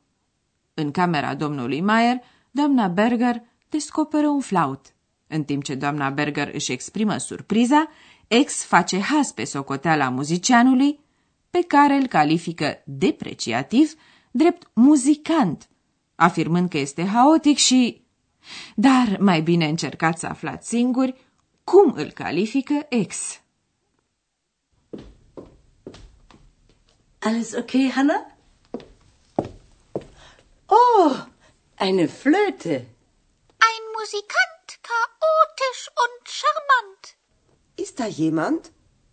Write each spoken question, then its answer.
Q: Dar mai bine încercați să aflați singuri cum îl califică ex.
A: Ex spune că muzicianul e charmant, adică fermecător, încântător.